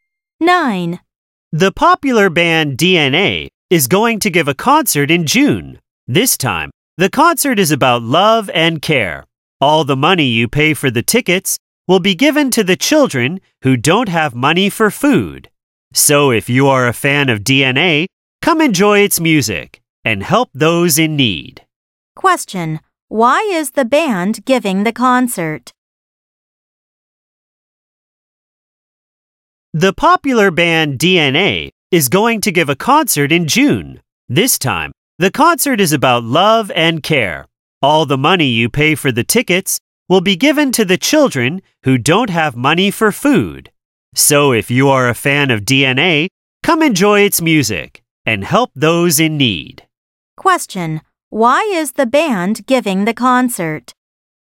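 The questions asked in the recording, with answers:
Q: why is the band giving the concert?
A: To raise money for children who don't have money for food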